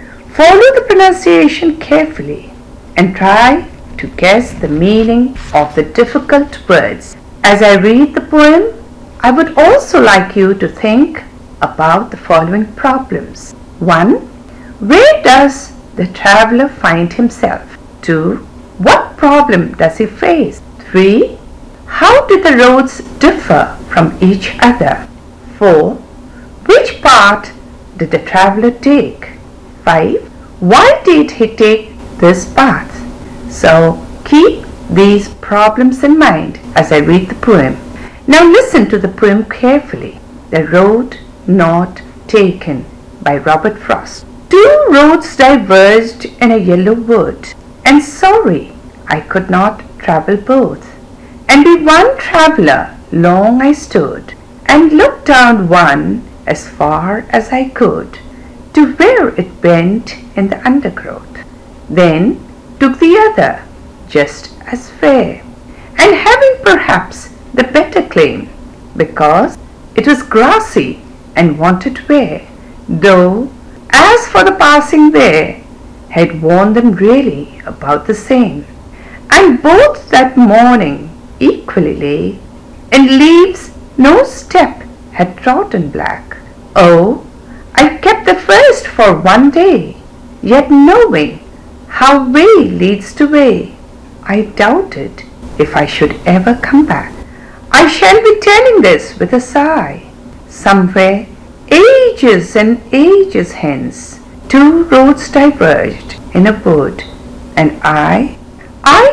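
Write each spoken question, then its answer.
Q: Where does the traveler find himself?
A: In a yellow wood where two roads diverged

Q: What problem does he face?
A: He cannot travel both roads and must choose one

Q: Which part did the traveler take?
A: The other road, the grassy one that wanted wear

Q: Why did he take this path?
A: Because it was grassy and wanted wear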